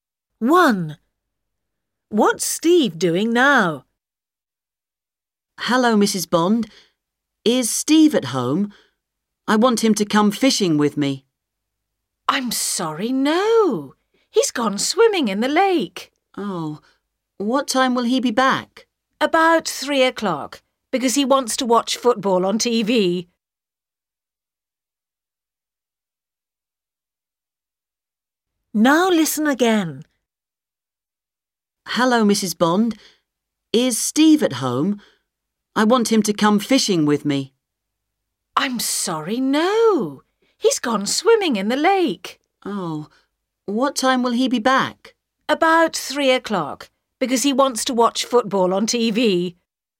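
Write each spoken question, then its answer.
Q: What's Steve doing now?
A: Swimming in the lake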